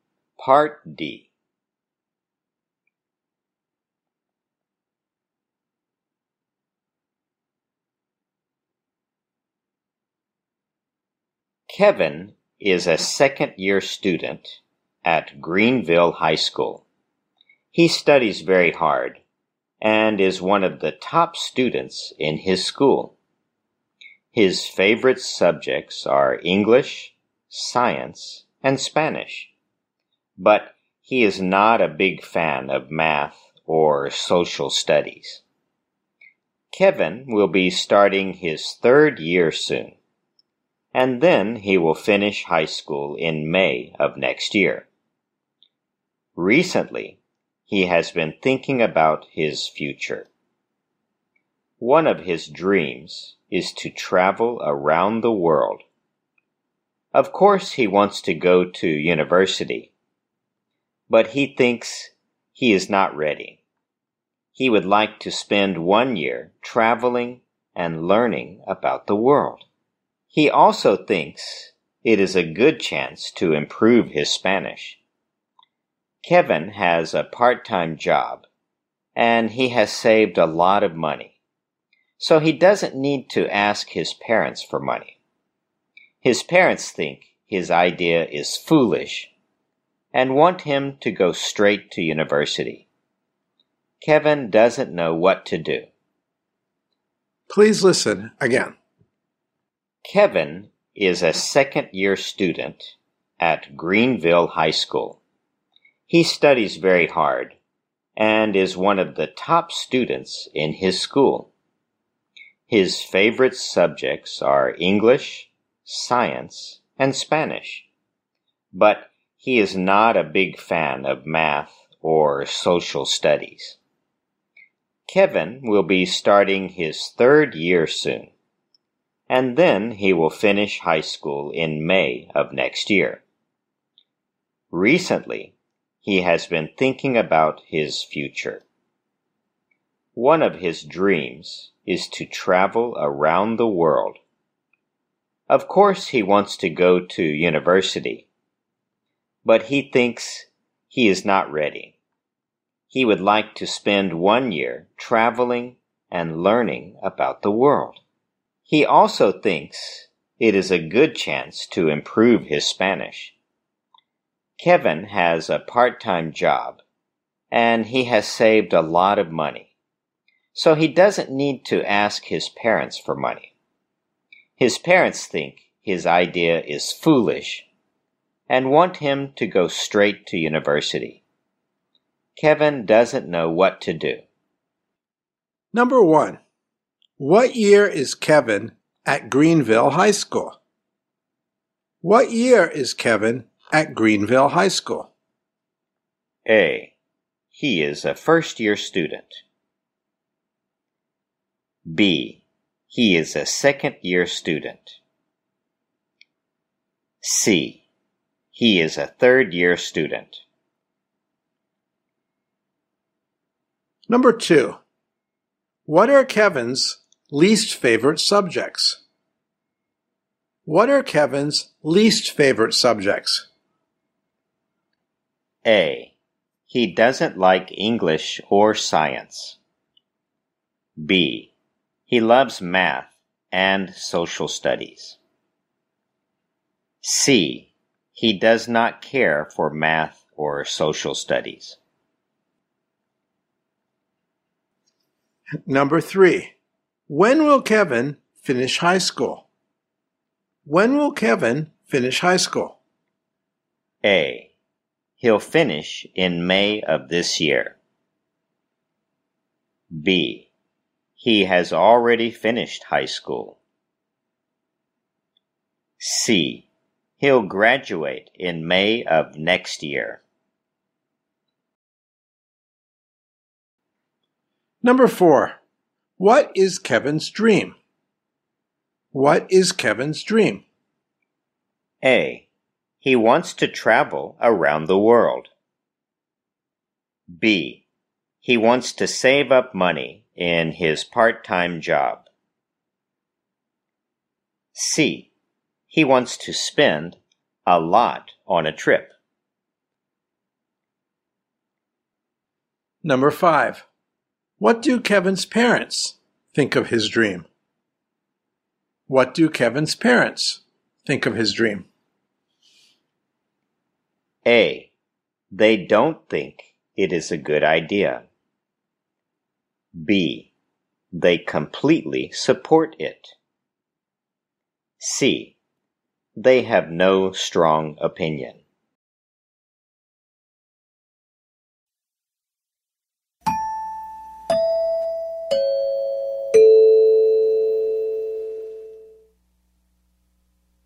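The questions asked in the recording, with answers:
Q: what year is Kevin at Greenville High School?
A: B: He is a second-year student.

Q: what are Kevin's least favorite subjects?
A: C: He does not care for math or social studies.

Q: when will Kevin finish high school?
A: C: He'll graduate in May of next year.

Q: what is Kevin's dream?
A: A: He wants to travel around the world.

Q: What do Kevin's parents think of his dream?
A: A: They don't think it is a good idea.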